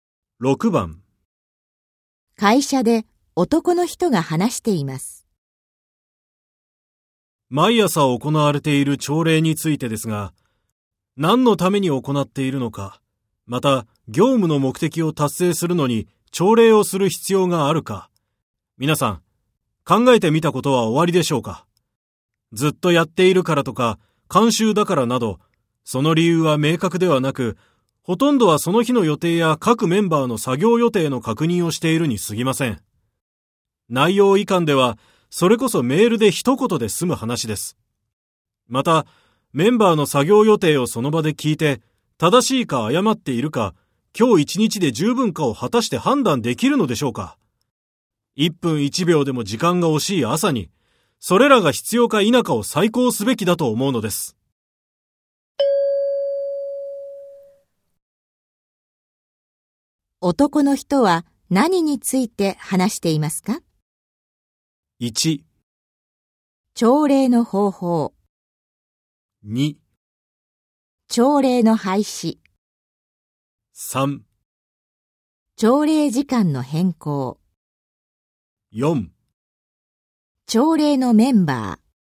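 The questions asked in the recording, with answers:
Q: 男の人は何について話していますか?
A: 2: 朝礼の廃止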